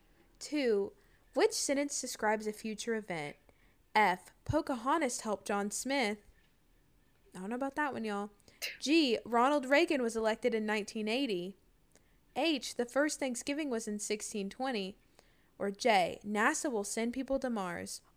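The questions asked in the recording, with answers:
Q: Which sentence describes a future event?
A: J: NASA will send people to Mars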